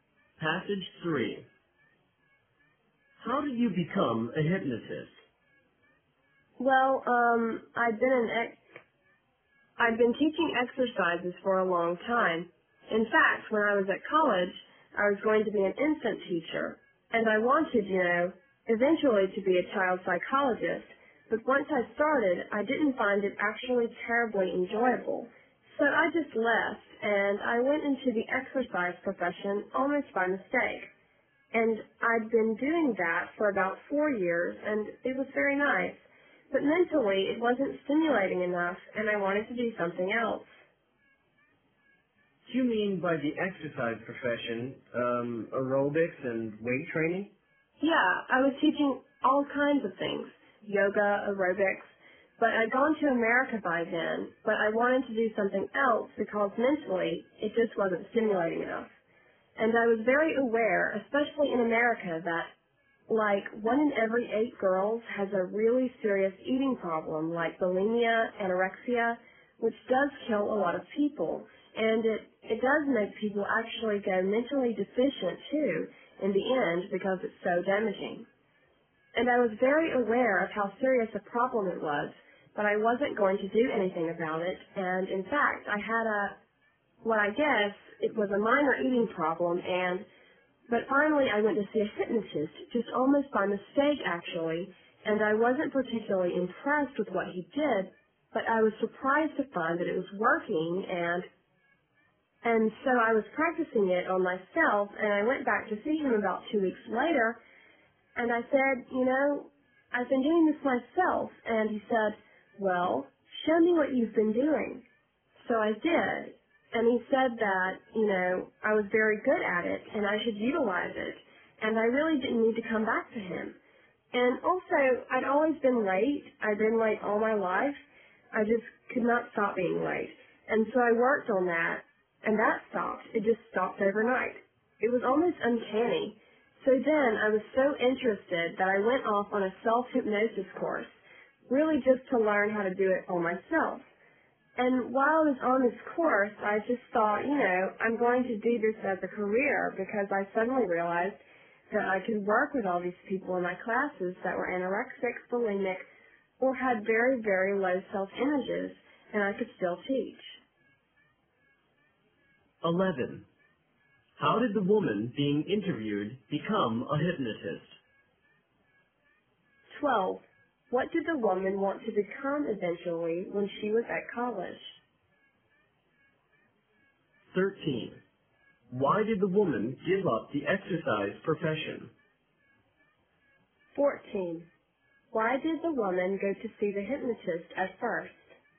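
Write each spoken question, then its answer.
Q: How did the woman being interviewed become a hypnotist?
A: Almost by accident: a hypnotist helped with her eating problem, she practised on herself and then took a self-hypnosis course

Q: What did the woman want to become eventually when she was at college?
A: A child psychologist

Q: Why did the woman give up the exercise profession?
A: It wasn't mentally stimulating enough

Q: Why did the woman go to see the hypnotist at first?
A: She had a minor eating problem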